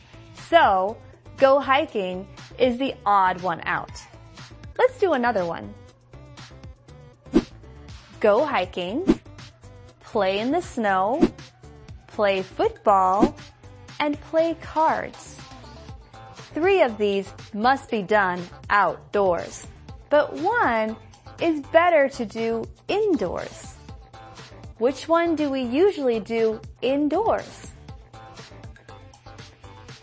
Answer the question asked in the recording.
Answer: Play cards is the answer.